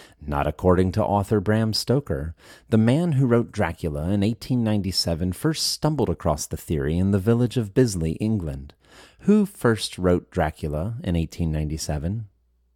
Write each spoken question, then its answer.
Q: Who first wrote Dracula in 1897?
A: Bram Stoker first wrote Dracula in 1897.